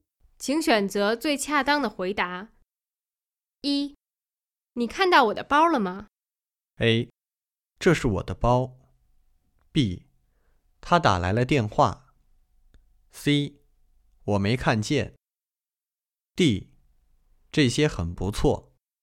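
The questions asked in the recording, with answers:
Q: 你看到我的包了吗?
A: C: 我没看见。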